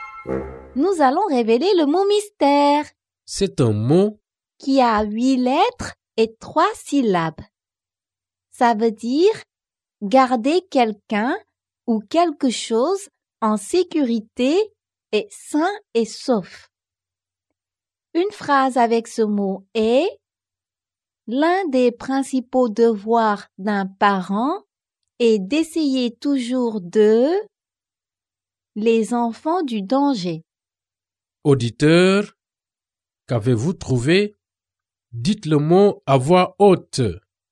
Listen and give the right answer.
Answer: Le mot mystère est protéger.